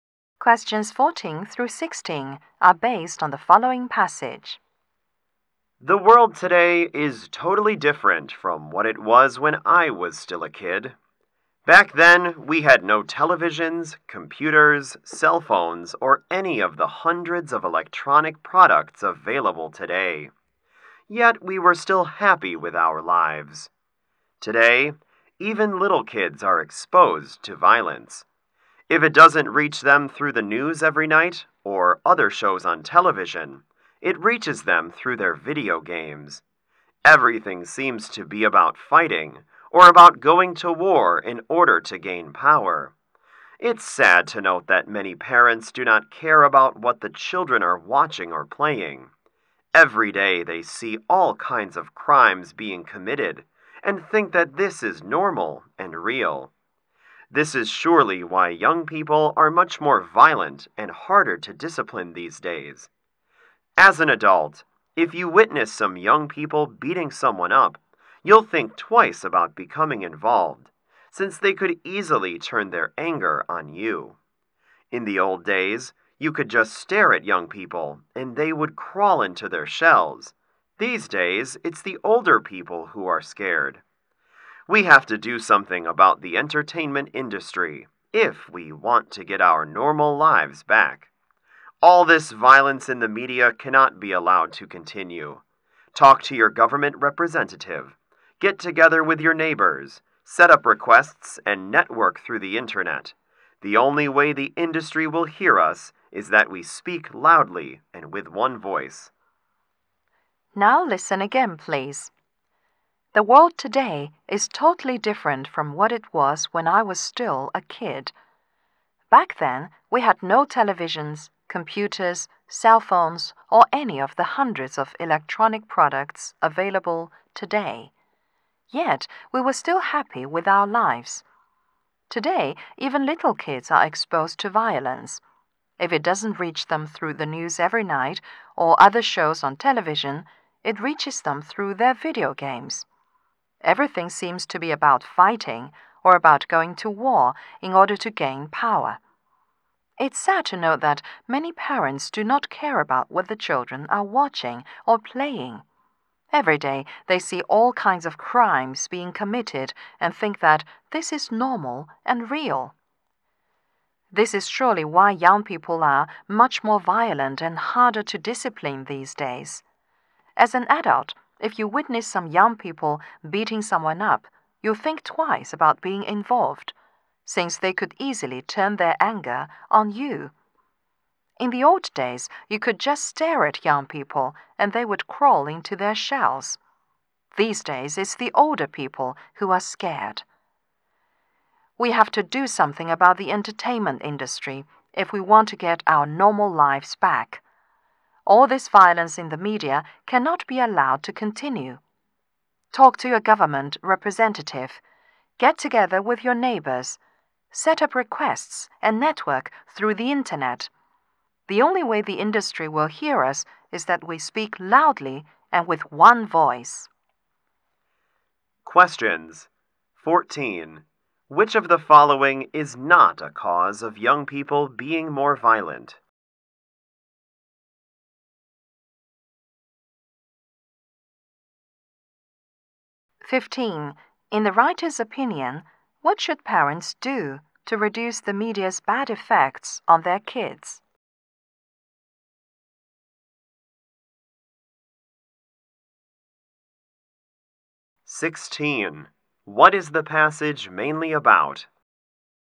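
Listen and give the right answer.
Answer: Media violence makes young people more violent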